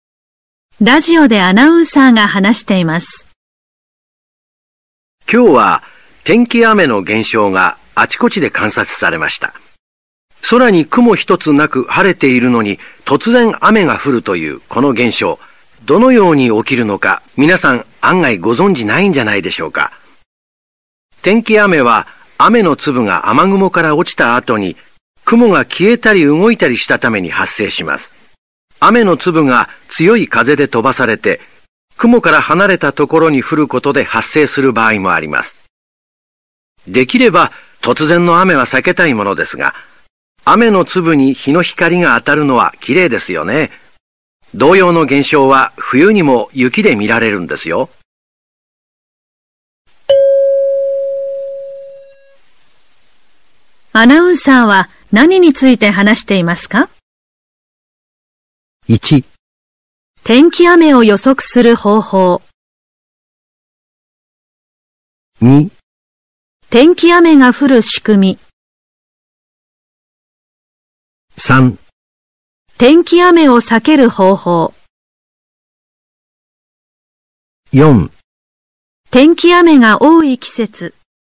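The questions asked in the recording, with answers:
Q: アナウンサーは何について話していますか?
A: 2: 天気雨が降る仕組み。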